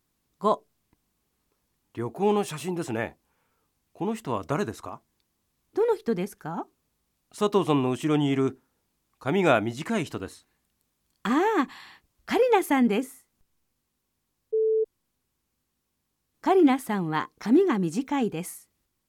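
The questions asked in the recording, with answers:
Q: カリナさんは髪が短いです。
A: ○(正しい)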